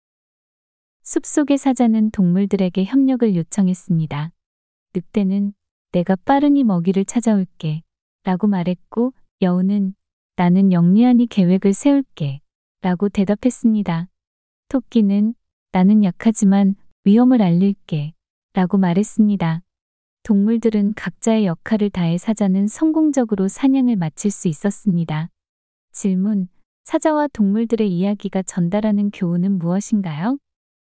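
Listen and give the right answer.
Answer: 각자의 역할을 다해 협력하면 성공할 수 있다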